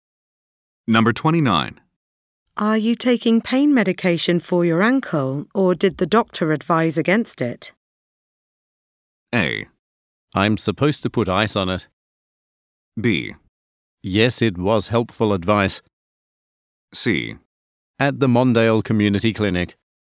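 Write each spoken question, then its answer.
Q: Are you taking pain medication for your ankle, or did the doctor advise against it?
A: A: I'm supposed to put ice on it.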